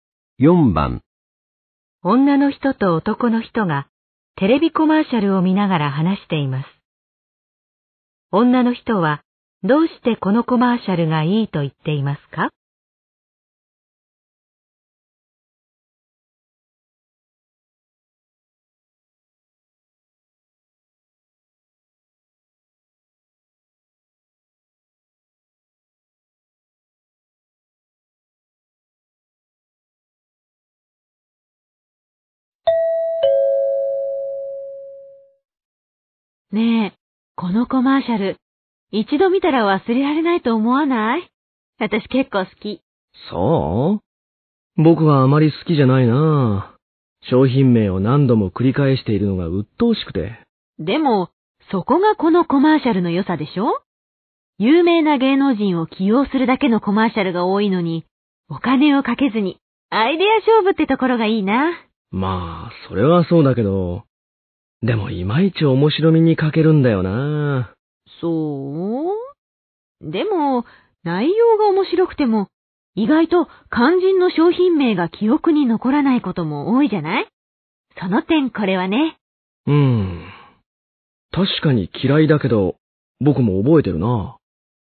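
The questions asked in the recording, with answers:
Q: 女の人は、どうしてこのコマーシャルがいいと言っていますか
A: 商品名が記憶に残るから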